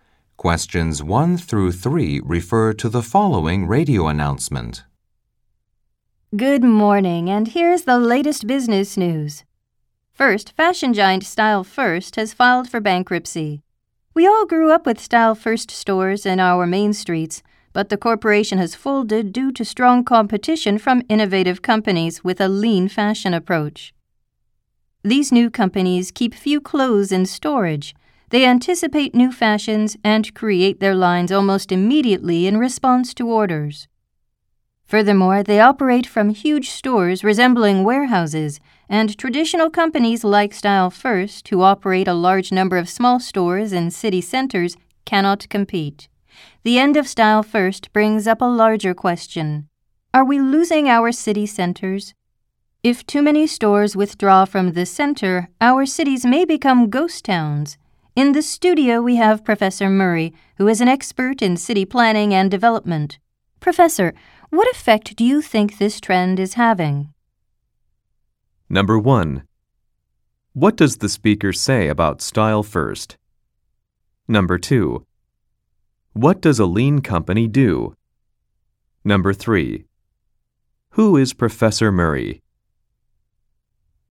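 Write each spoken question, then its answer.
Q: What does the speaker say about Style First?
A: It has filed for bankruptcy.

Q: What does a lean company do?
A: It keeps few clothes in storage and makes its lines quickly in response to orders.

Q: Who is Professor Murray?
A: An expert in city planning and development.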